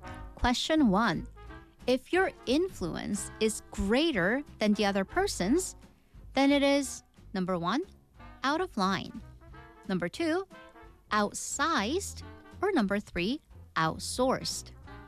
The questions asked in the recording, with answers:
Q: If your influence is greater than the other person's, then it is number 1, out of line. Number 2, outsized. Or number 3, outsourced.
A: The answer was number 2, outsized.